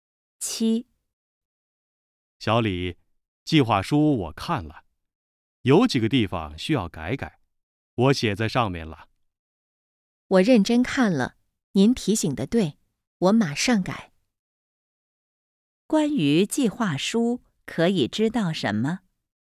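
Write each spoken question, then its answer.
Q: 关于计划书,可以知道什么?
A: 有几个地方需要改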